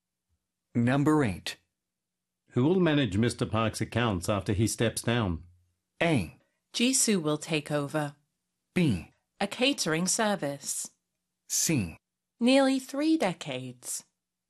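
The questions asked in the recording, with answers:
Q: Who will manage Mr. Park's accounts after he steps down?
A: A: Jisoo will take over.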